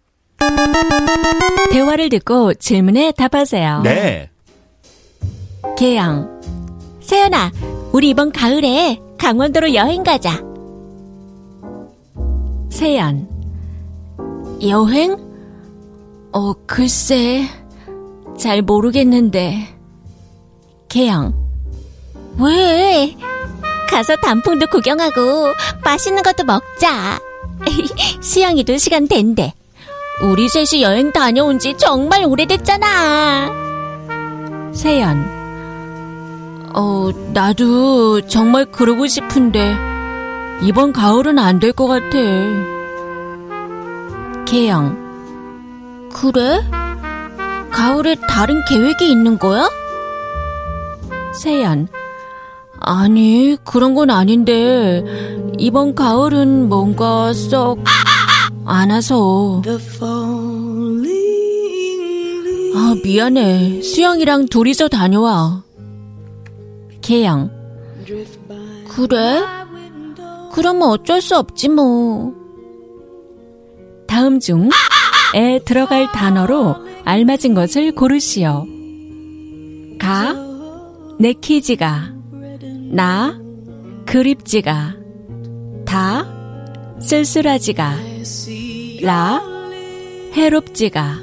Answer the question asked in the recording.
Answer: 가 내키지가